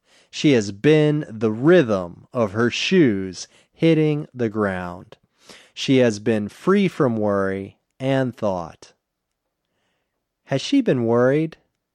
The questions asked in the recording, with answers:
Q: Has she been worried?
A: No, she has been free from worry.